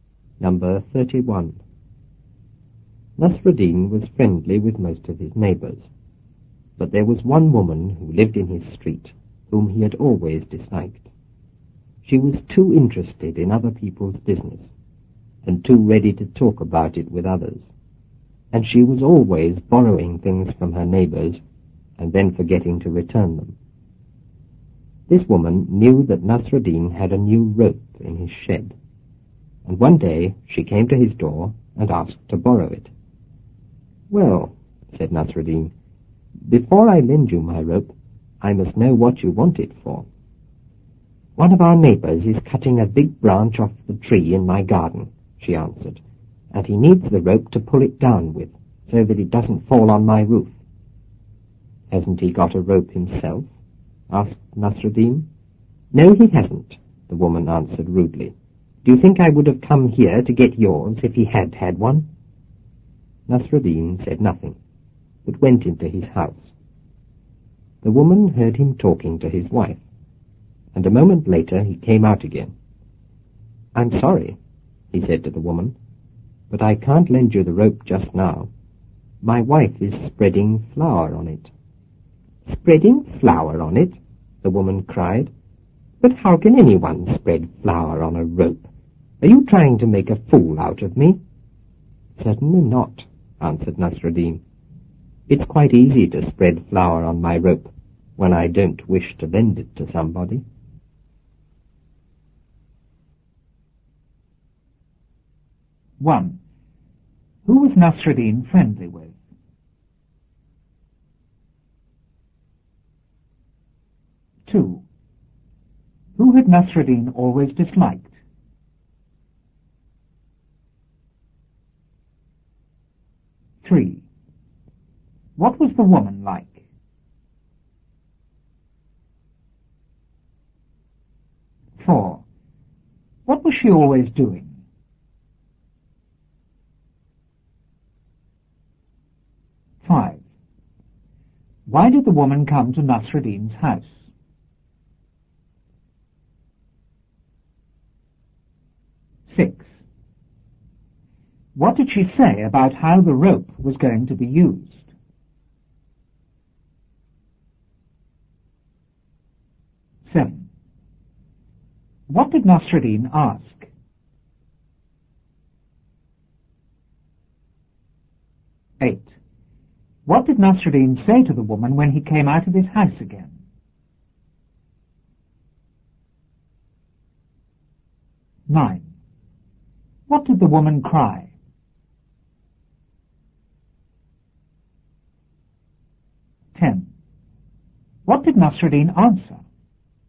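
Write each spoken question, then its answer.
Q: Who was Nasruddin friendly with?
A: Most of his neighbours

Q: Who had Nasruddin always disliked?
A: A woman who lived in his street

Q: What was the woman like?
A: Too interested in other people's business and too ready to talk about it

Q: What was she always doing?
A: Borrowing things from her neighbours and forgetting to return them

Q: Why did the woman come to Nasruddin's house?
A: To borrow his new rope

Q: What did she say about how the rope was going to be used?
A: A neighbour needed it to pull down a big branch he was cutting off her tree, so it wouldn't fall on her roof

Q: What did Nasruddin ask?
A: Whether the neighbour had a rope himself

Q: What did Nasruddin say to the woman when he came out of his house again?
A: He couldn't lend the rope because his wife was spreading flour on it

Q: What did the woman cry?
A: How can anyone spread flour on a rope? 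Are you trying to make a fool of me?

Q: What did Nasruddin answer?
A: It's easy to spread flour on his rope when he doesn't wish to lend it to somebody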